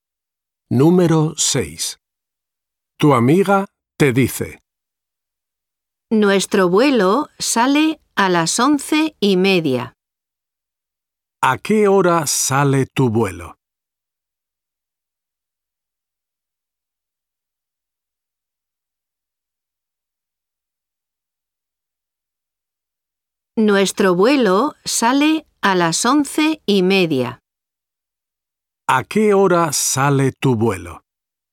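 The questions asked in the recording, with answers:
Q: ¿A qué hora sale tu vuelo?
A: a las 11:30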